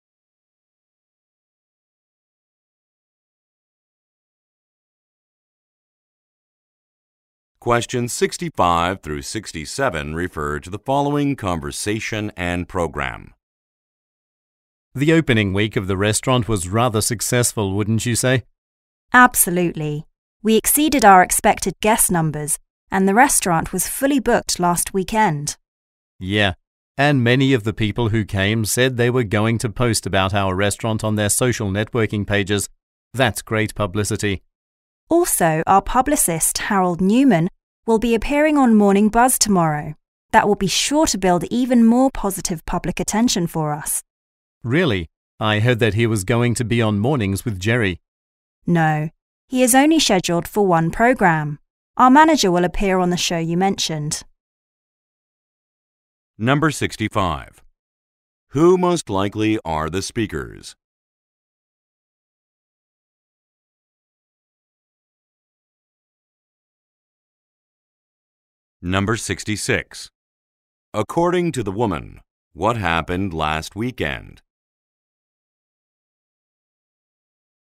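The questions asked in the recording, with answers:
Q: Who most likely are the speakers?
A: Restaurant staff

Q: According to the woman, what happened last weekend?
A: The restaurant was fully booked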